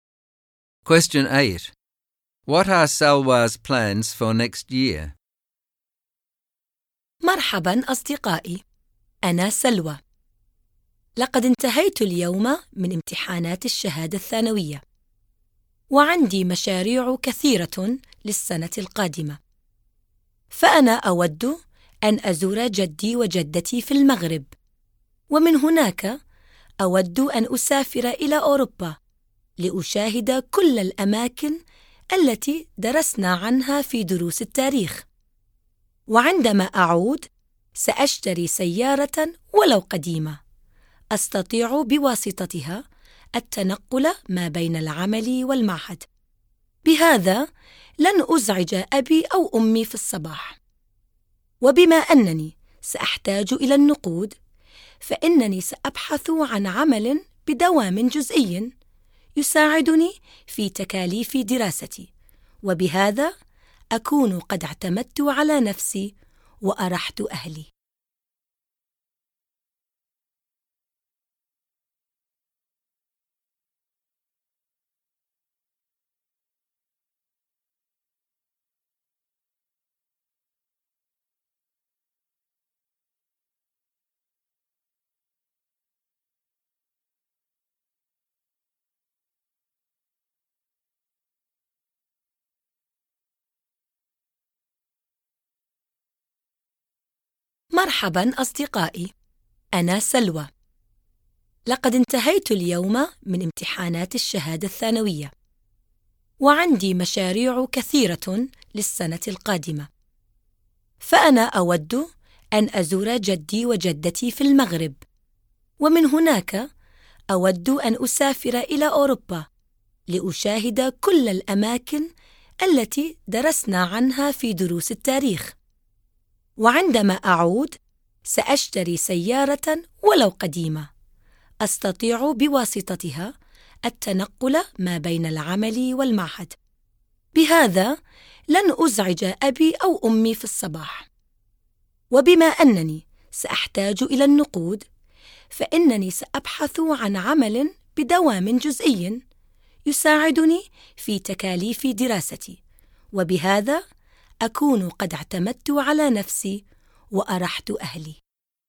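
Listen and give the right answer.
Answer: Visit her grandparents in Morocco, travel to Europe to see historical places, buy an old car to get to work and college, and find a part-time job to pay for her studies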